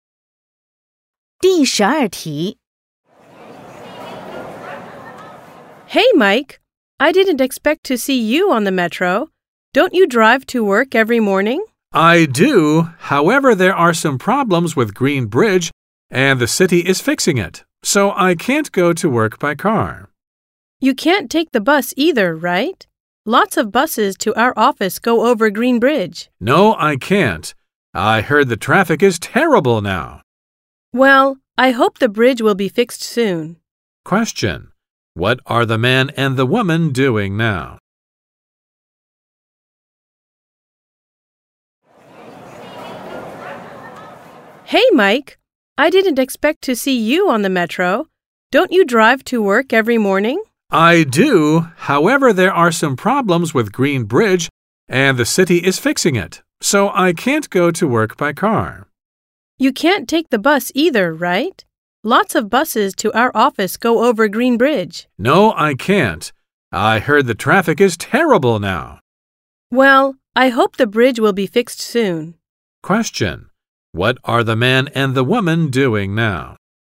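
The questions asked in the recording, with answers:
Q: What are the man and the woman doing now?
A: Taking the metro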